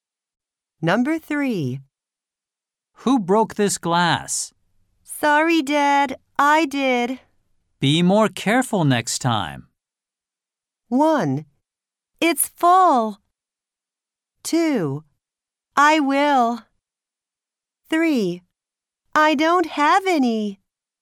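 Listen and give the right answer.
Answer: 2: I will.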